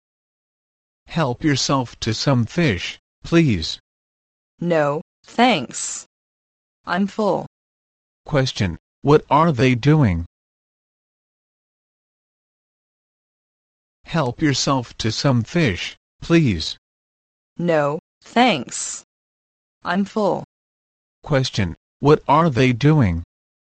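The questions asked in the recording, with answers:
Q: Question, what are they doing?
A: Having a meal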